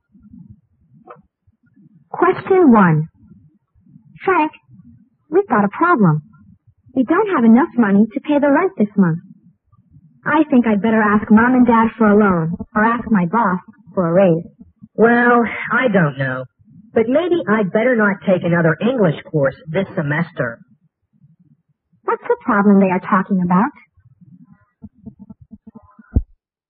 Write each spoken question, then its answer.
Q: What's the problem they are talking about?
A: they can't pay the rent this month